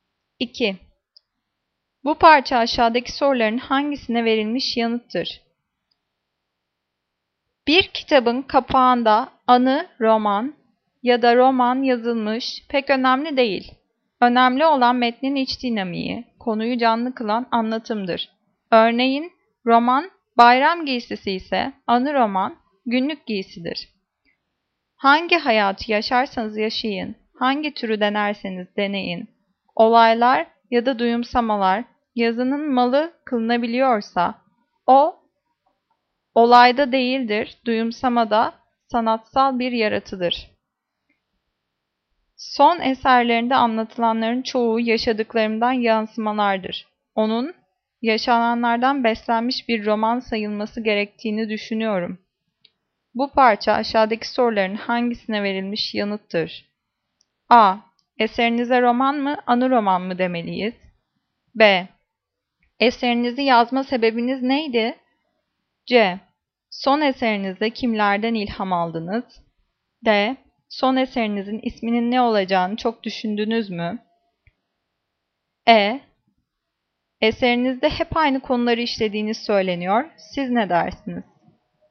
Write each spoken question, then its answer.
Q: Bu parça aşağıdaki soruların hangisine verilmiş yanıttır?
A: Cevap A. Eserinize roman mı, anı roman mı demeliyiz?